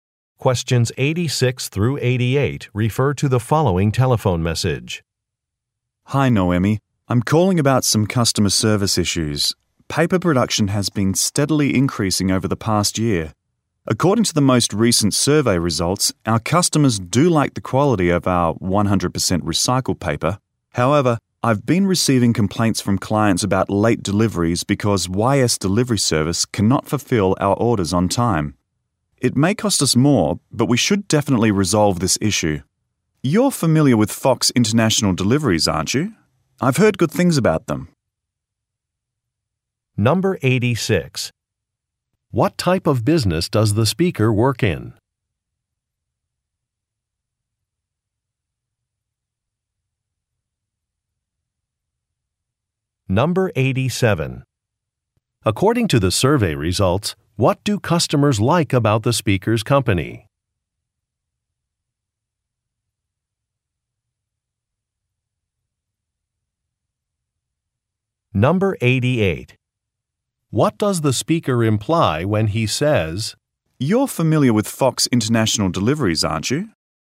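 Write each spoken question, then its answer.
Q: What type of business does the speaker work in?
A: Paper production

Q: According to the survey results, what do customers like about the speaker's company?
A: The quality of its 100% recycled paper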